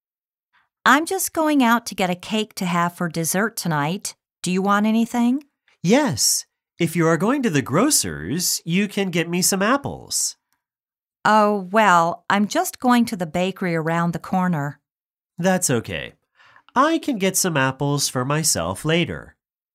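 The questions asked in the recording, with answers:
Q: Where is the woman going?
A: To the bakery around the corner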